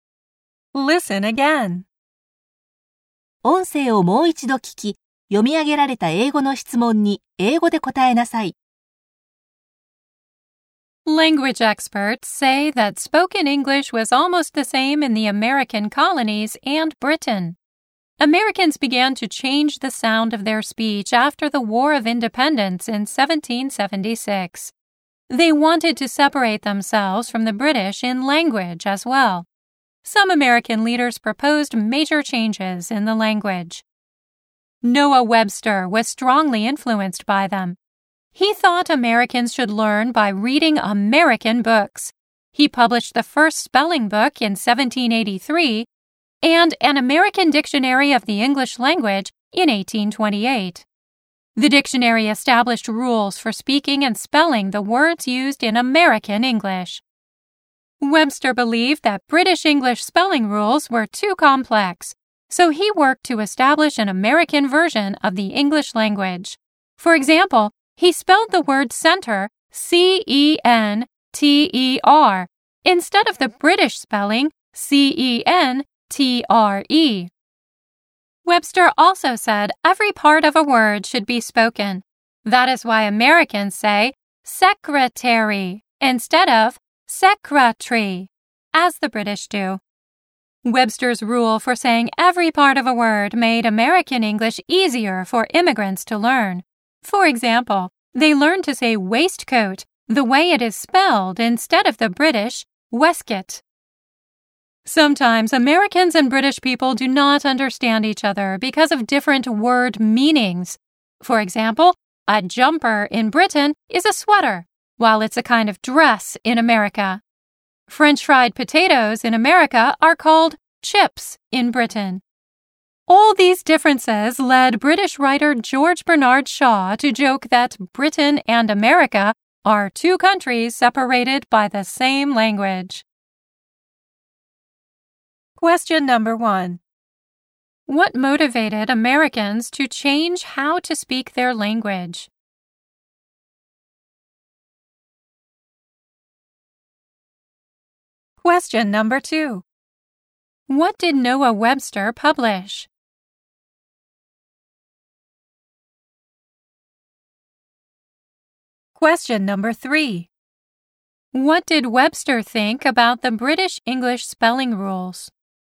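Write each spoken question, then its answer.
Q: What motivated Americans to change how to speak their language?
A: They wanted to separate themselves from the British in language after the War of Independence.

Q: What did Noah Webster publish?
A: The first spelling book (1783) and an American Dictionary of the English Language (1828).

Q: What did Webster think about the British English spelling rules?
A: He thought they were too complex.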